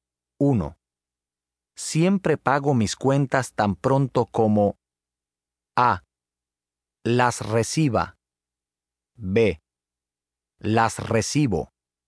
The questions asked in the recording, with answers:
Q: Siempre pago mis cuentas tan pronto como A. Las reciba. B. Las recibo.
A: B. Siempre pago mis cuentas tan pronto como las recibo.